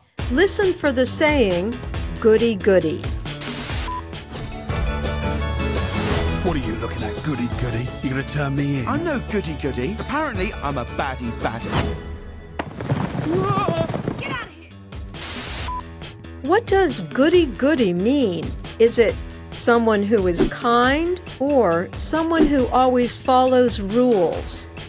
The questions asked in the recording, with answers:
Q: What does goody goody mean?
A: The answer is B. Someone who always follows rules.